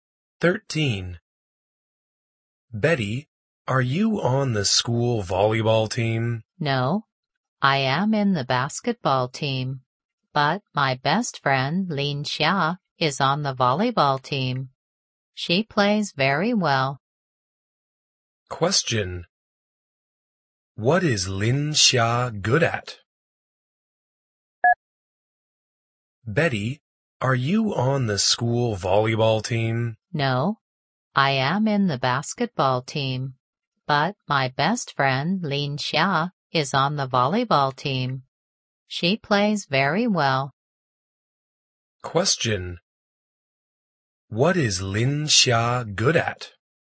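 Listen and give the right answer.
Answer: Playing volleyball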